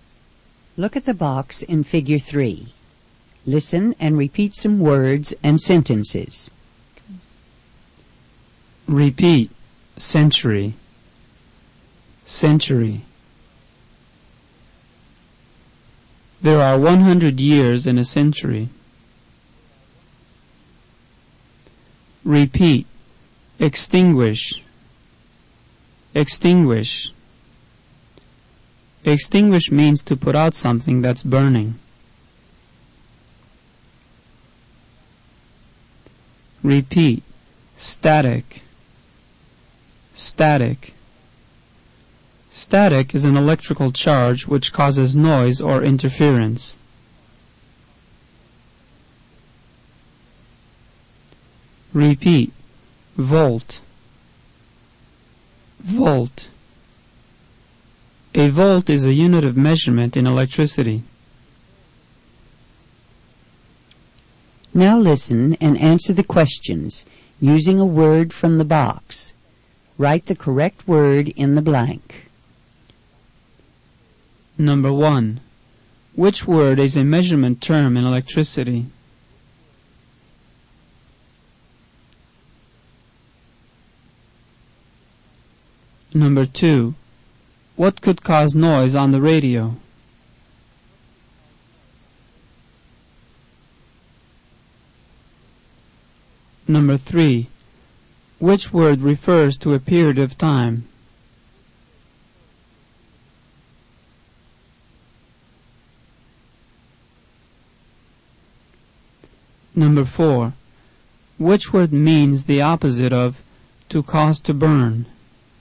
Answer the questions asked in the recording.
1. Number 1 is volt.
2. Number 2 is static.
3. Number 3 is century.
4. Number 4 is extinguish.